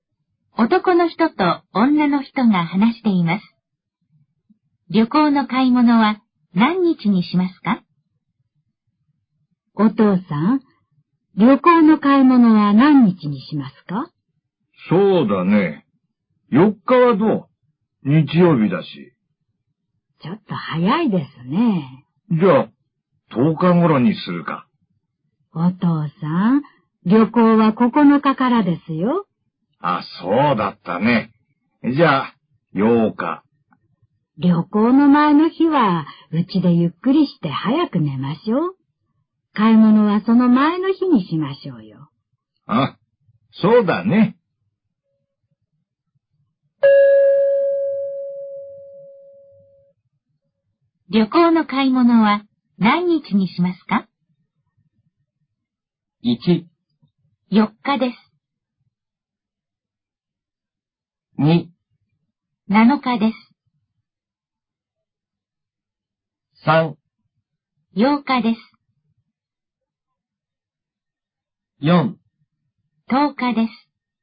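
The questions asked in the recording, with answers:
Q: 旅行の買い物は何日にしますか?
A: 2: 7日です。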